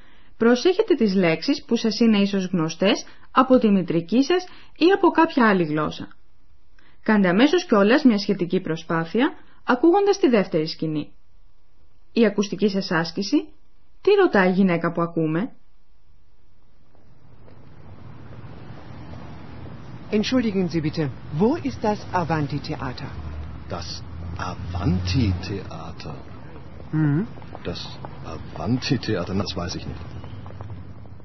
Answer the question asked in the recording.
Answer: Καταλάβατε πως η γυναίκα ψάχνει να βρει ένα θέατρο?